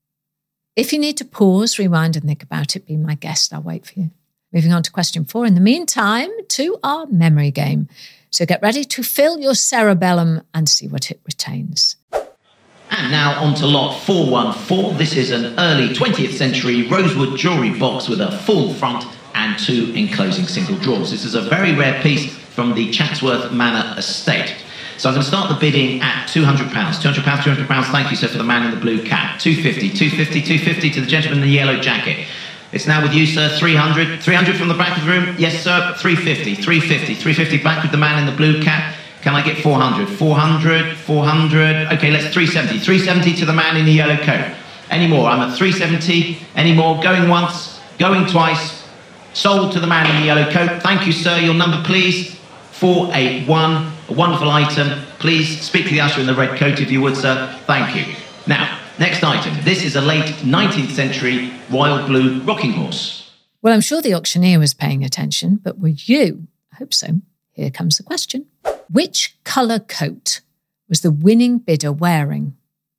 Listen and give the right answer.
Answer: And the answer is yellow.